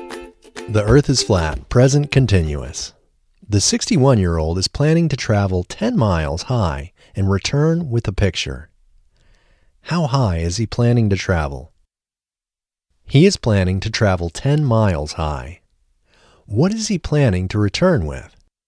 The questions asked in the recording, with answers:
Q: What is he planning to return with?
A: He is planning to return with a picture.